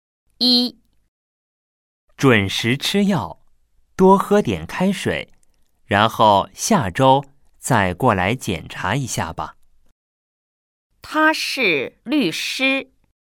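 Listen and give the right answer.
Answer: 错(他是医生)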